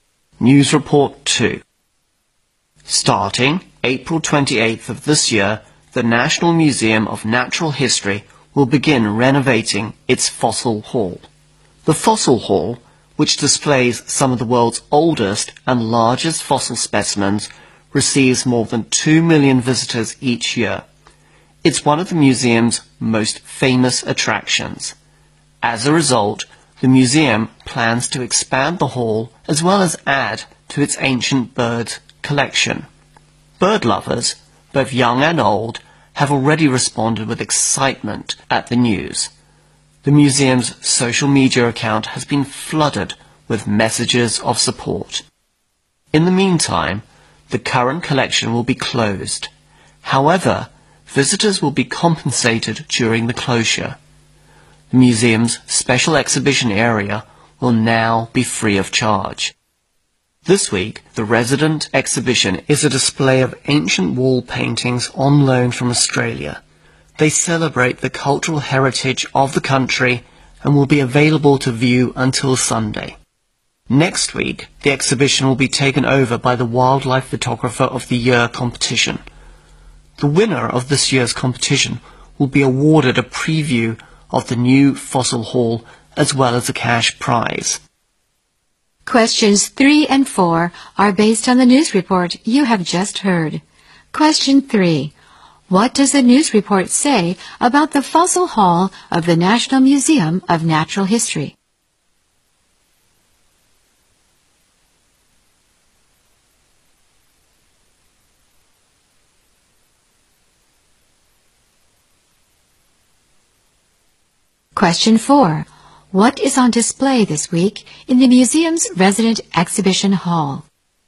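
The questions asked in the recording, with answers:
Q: What does the news report say about the Fossil Hall of the National Museum of Natural History?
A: It will be renovated and expanded starting April 28

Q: What is on display this week in the museum's resident exhibition hall?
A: Ancient wall paintings on loan from Australia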